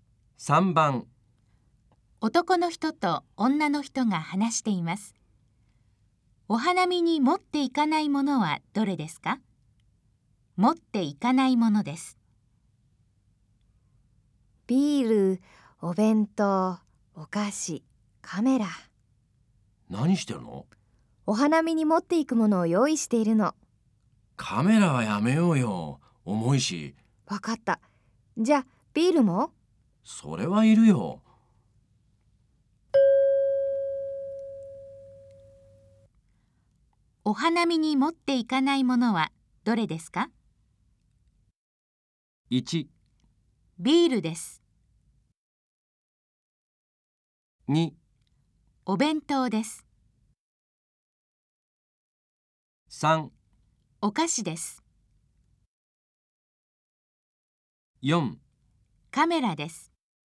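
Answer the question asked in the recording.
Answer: 4: カメラです。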